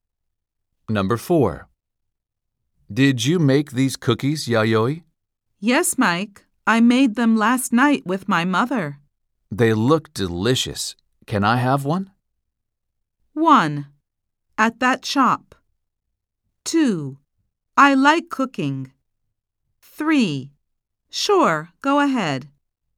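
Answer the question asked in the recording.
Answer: 3: Sure, go ahead.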